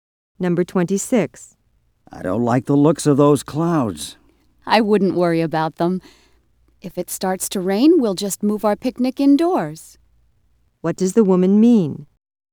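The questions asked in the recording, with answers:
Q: What does the woman mean?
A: Rain won't be a problem because they can move the picnic indoors.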